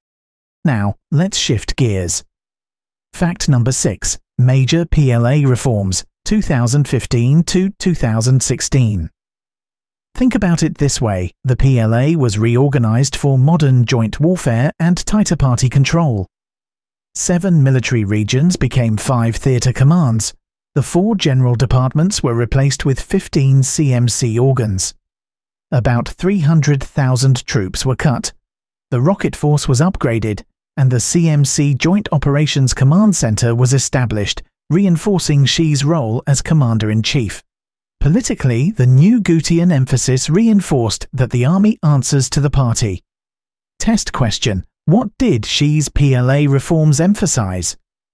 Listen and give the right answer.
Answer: Correct answer. Party control and joint warfighting.